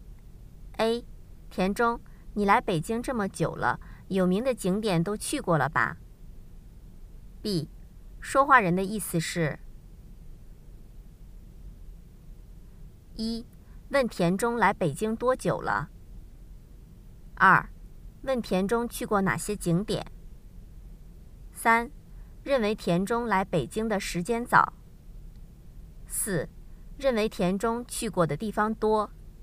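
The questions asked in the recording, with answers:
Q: 说话人的意思是:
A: 四: 认为田中去过的地方多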